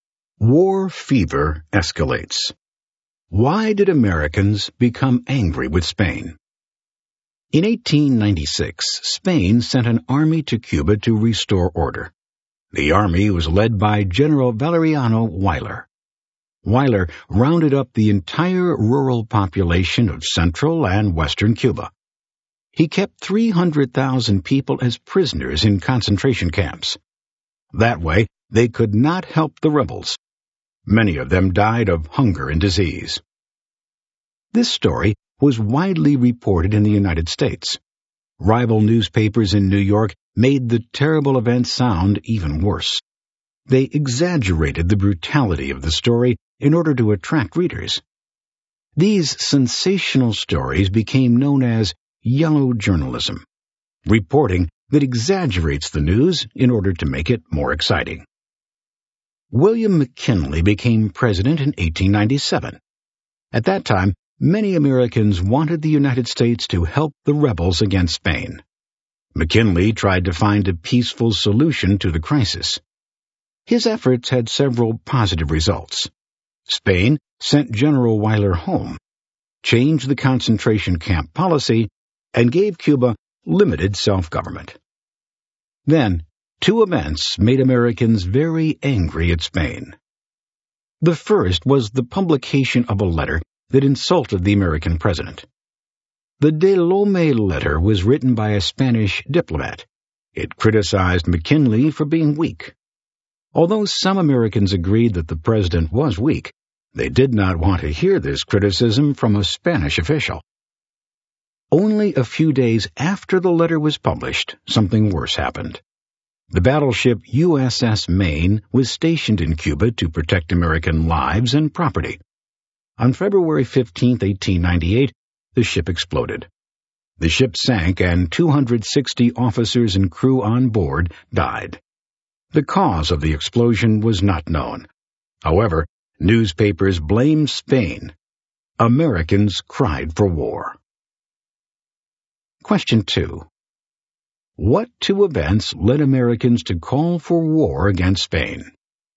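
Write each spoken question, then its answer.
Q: What two events led Americans to call for war against Spain?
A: The publication of the De Lome letter and the explosion of the USS Maine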